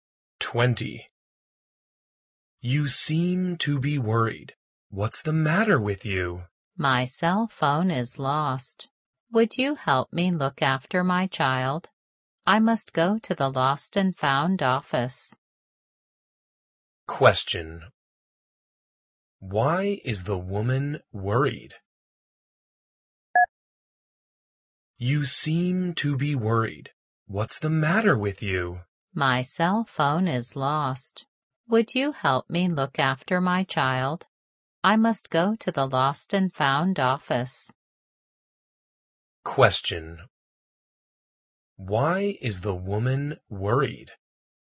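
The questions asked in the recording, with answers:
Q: Why is the woman worried?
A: Her cell phone is lost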